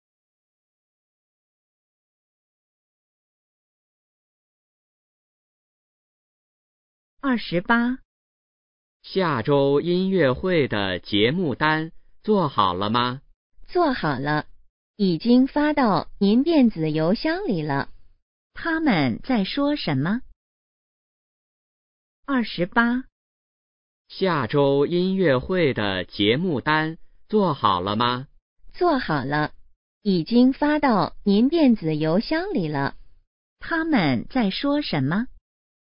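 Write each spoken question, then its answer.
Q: 他们在说什么?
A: 音乐会的节目单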